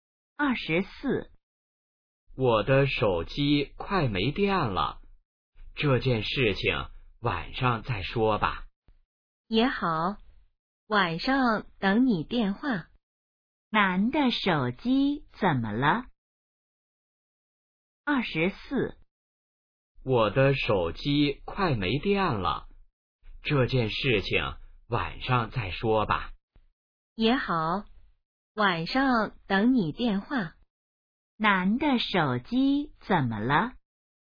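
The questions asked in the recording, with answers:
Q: 男的手机怎么了?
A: 快没电了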